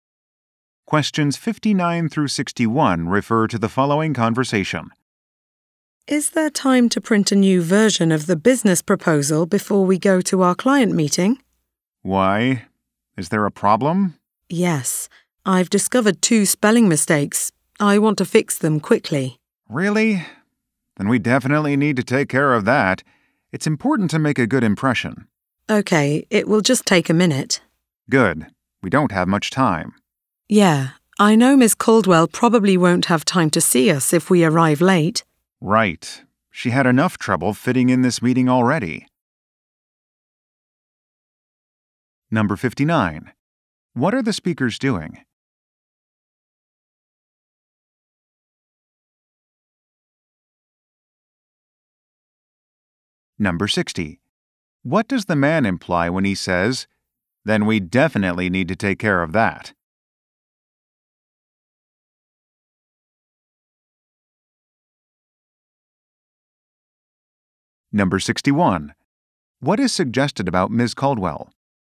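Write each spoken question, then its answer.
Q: What are the speakers doing?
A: Preparing for a client meeting

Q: What does the man imply when he says, "Then we definitely need to take care of that"?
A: The mistakes must be corrected before the meeting

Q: What is suggested about Ms.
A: She has a busy schedule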